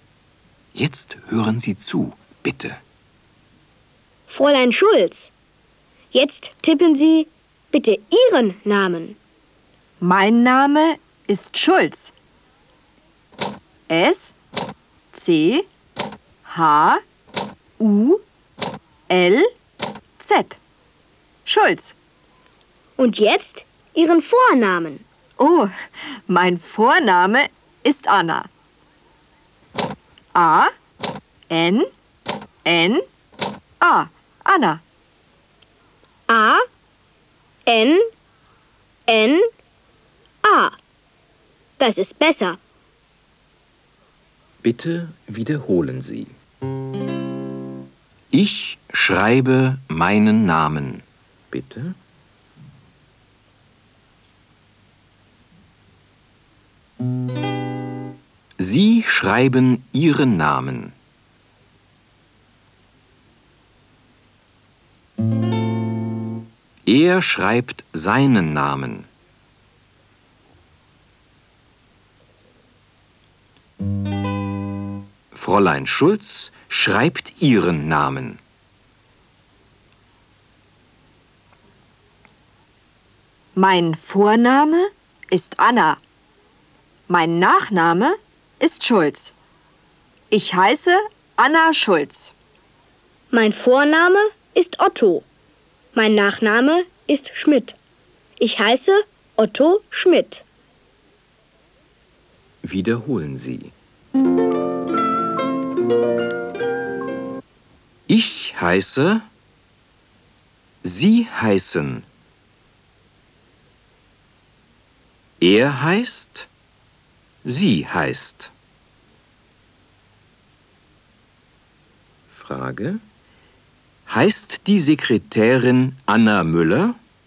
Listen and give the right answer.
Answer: Nein.